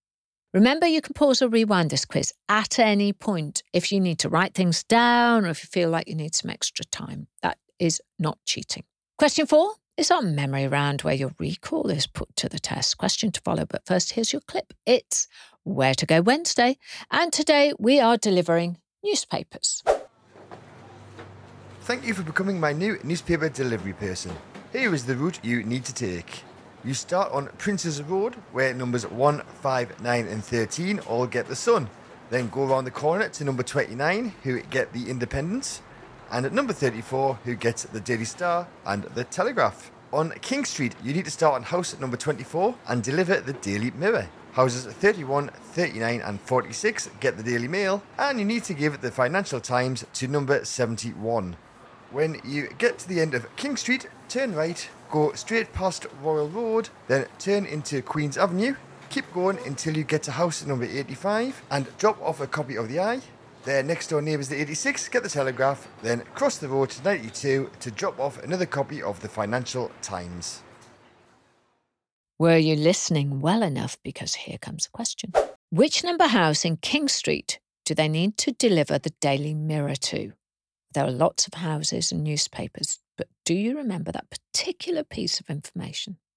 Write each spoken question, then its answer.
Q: Which number house in King Street do they need to deliver the Daily Mirror to?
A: The answer was number 24, King Street.